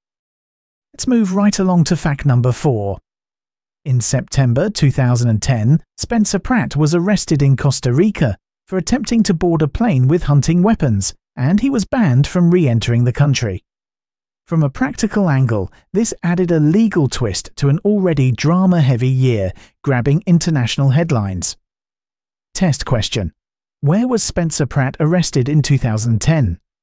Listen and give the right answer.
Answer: Correct answer. Costa Rica.